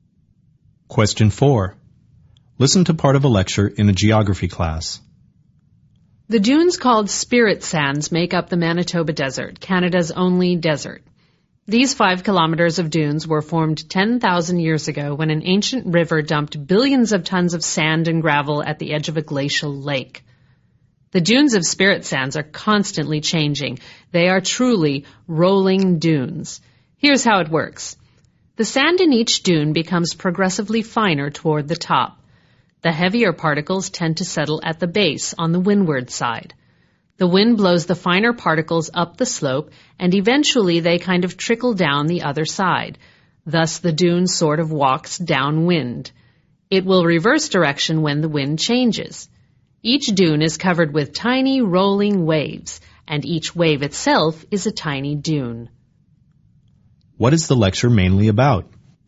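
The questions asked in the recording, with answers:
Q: What is the lecture mainly about?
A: How the moving sand dunes of Spirit Sands (Manitoba Desert) form and change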